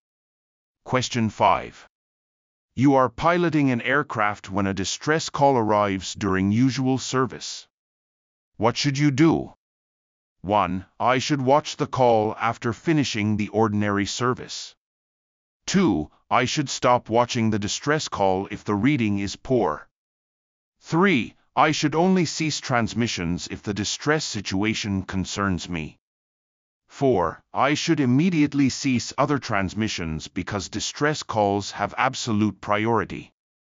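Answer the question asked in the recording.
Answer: 4: I should immediately cease other transmissions because distress calls have absolute priority.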